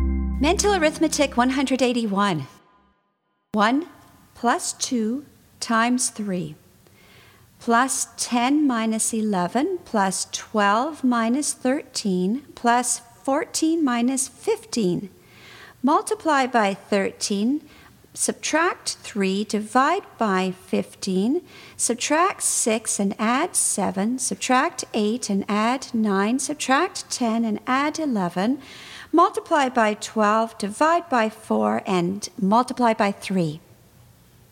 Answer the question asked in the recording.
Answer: And the answer is 72.